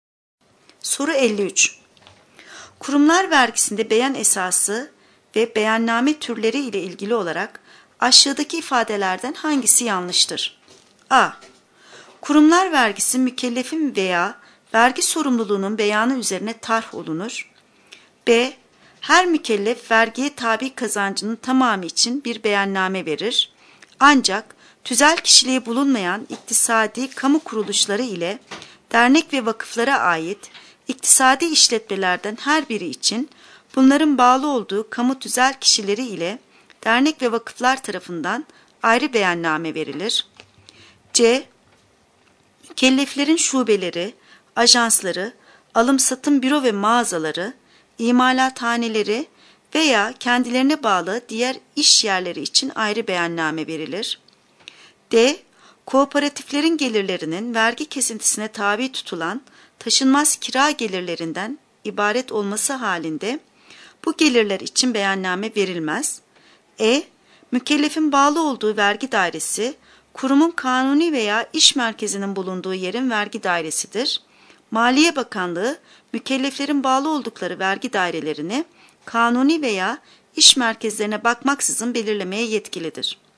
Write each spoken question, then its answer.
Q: Kurumlar vergisinde beyan esası ve beyanname türleri ile ilgili olarak aşağıdaki ifadelerden hangisi yanlıştır?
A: Doğru cevap C. Mükelleflerin şubeleri, ajansları, alım-satım büro ve mağazaları, imalathaneleri veya kendilerine bağlı diğer iş yerleri için ayrı beyanname verilir.